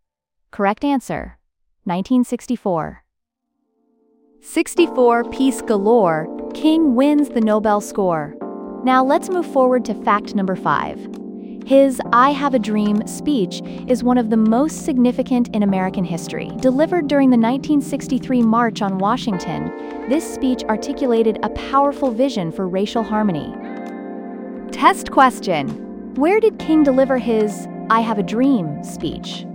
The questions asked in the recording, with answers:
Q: Where did King deliver his I Have a Dream speech?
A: Correct answer. March on Washington.